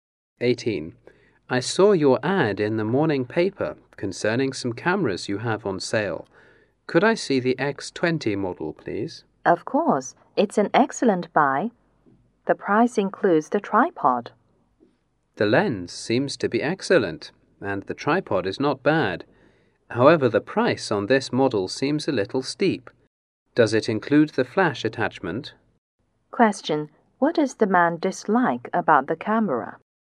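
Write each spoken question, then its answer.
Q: What does the man dislike about the camera?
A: The price is too high.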